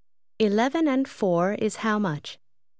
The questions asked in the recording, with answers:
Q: 11 and 4 is how much?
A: 15.